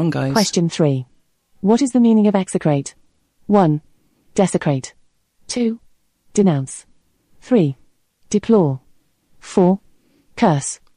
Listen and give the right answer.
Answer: The correct answer is 4.